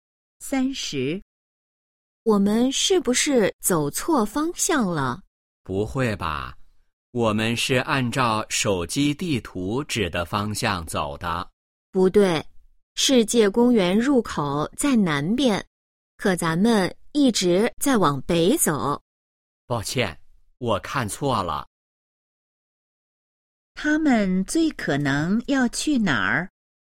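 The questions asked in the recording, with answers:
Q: 他们最可能要去哪儿?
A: 世界公园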